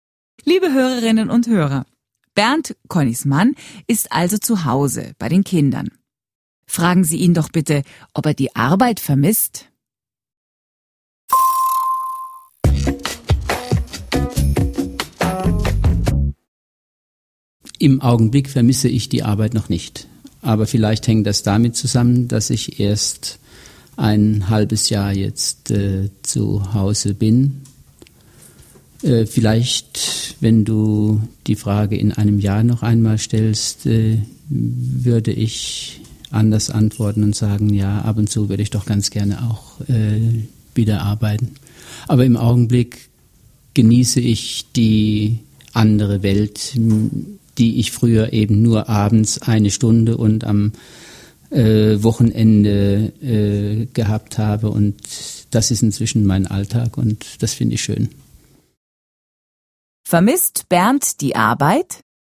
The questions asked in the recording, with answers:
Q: Vermisst Bernd die Arbeit?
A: Nein, er vermisst die Arbeit nicht.